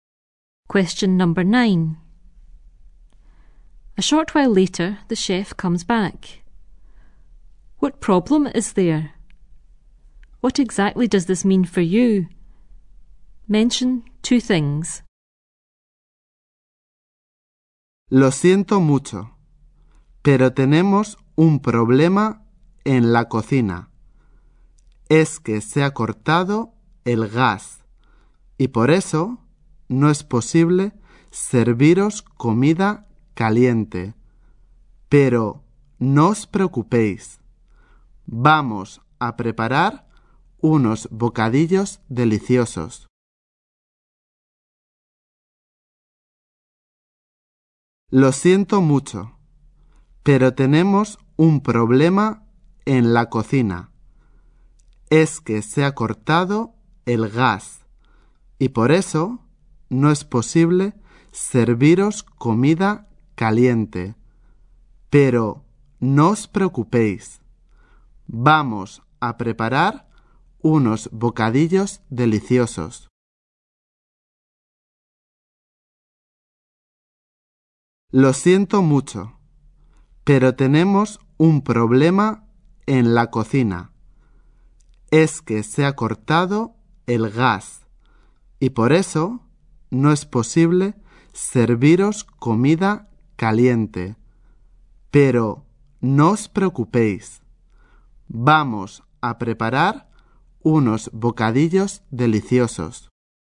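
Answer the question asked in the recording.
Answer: The gas has been cut off, so they can't serve hot food; you will get sandwiches instead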